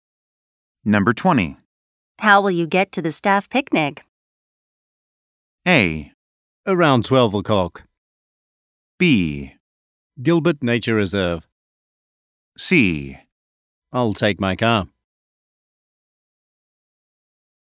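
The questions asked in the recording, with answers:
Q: How will you get to the staff picnic?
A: C: I'll take my car.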